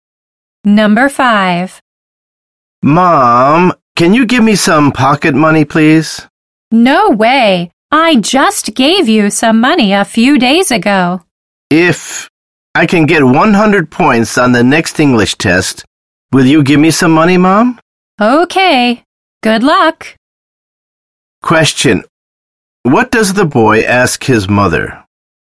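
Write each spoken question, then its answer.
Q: What does the boy ask his mother?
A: To give him pocket money if he gets 100 points on the next English test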